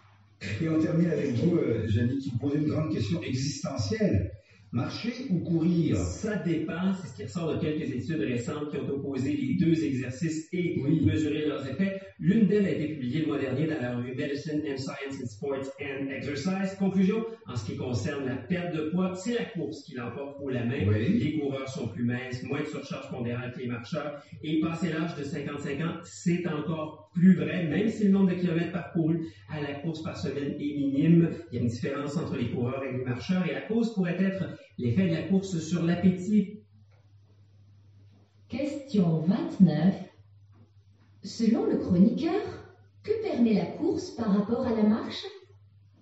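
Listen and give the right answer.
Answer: Une plus grande perte de poids (les coureurs sont plus minces que les marcheurs)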